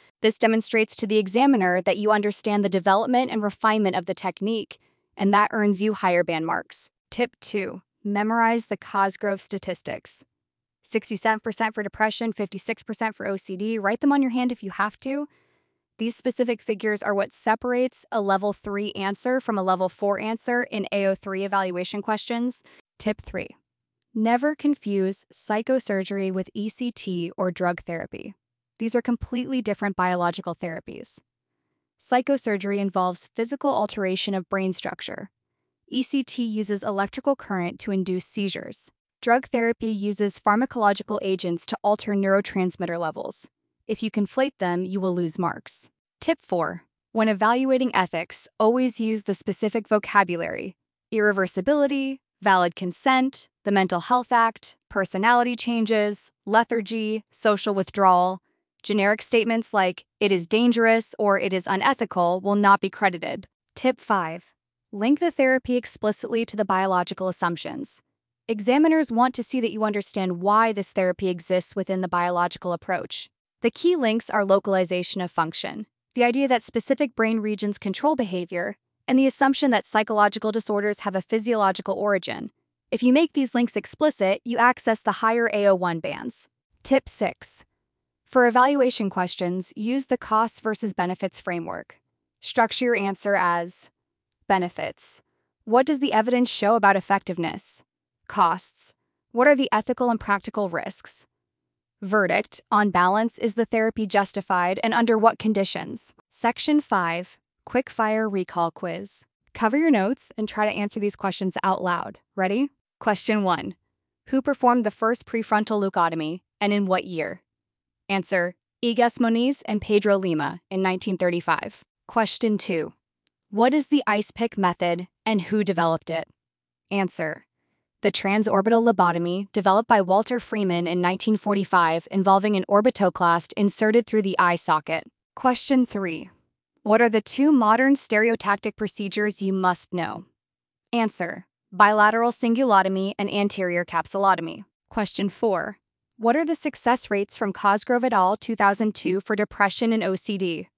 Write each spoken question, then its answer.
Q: What are the success rates from Cosgrove et al.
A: Answer, 67% for depression, 56% for OCD.